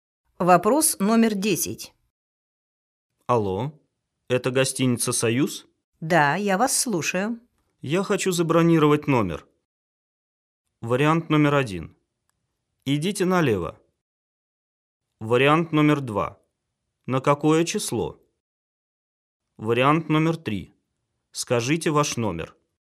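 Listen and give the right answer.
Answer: 2: На какое число?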